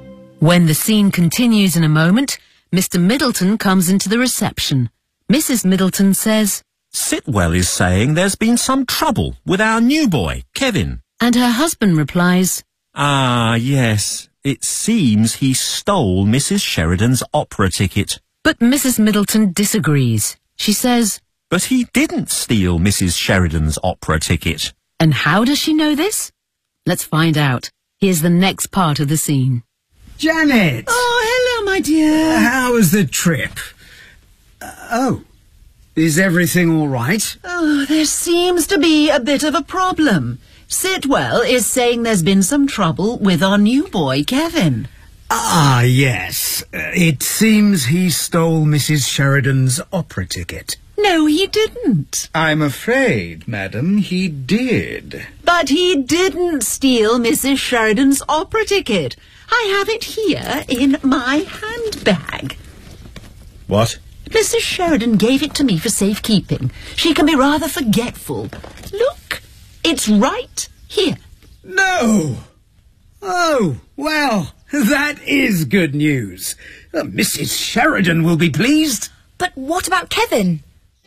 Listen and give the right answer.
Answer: I have it here, in my handbag.